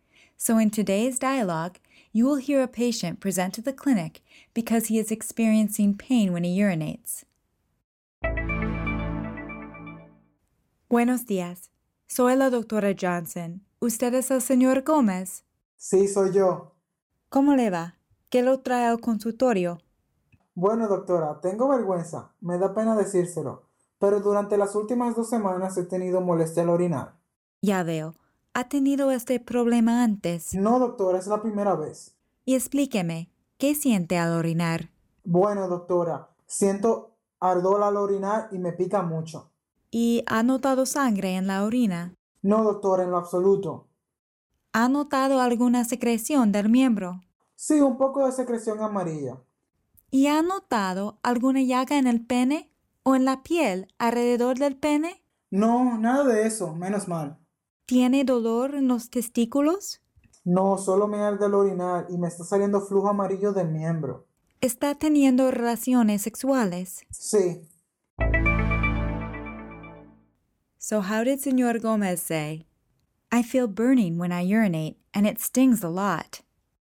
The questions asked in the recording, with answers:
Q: So how did Senor Gomez say? I feel burning when I urinate and it stings a lot.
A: Siento ardor al orinar y me pica mucho.